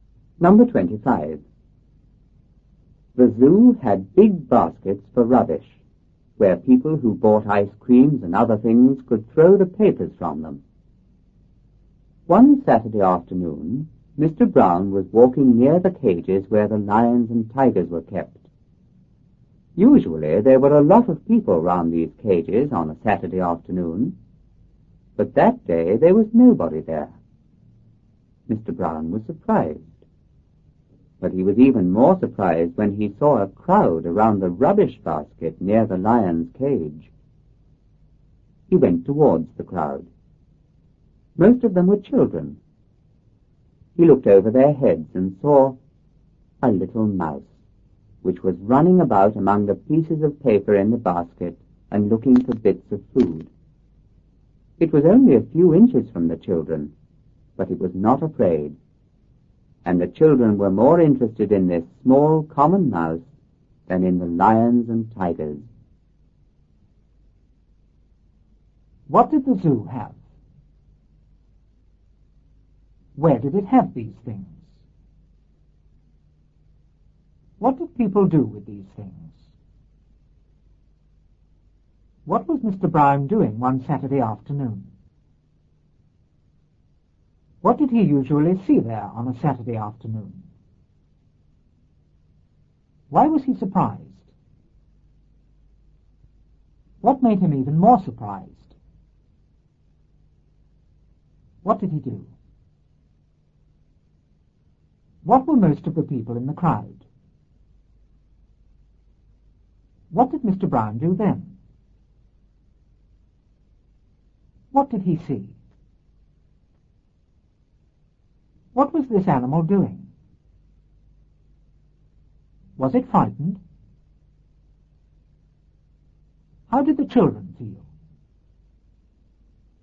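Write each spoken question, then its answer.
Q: What did the zoo have?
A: Big baskets for rubbish

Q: What did people do with these things?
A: Threw the papers from ice creams and other things into them

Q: What was Mr. Brown doing one Saturday afternoon?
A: Walking near the lion and tiger cages

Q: What did he usually see there on a Saturday afternoon?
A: A lot of people

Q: Why was he surprised?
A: There was nobody there

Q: What made him even more surprised?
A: A crowd around the rubbish basket near the lion's cage

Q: What did he do?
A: He went towards the crowd

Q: What were most of the people in the crowd?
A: Children

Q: What did Mr. Brown do then?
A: He looked over their heads

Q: What did he see?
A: A little mouse in the basket

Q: What was this animal doing?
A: Running about among the papers looking for bits of food

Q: Was it frightened?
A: No

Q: How did the children feel?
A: More interested in the mouse than in the lions and tigers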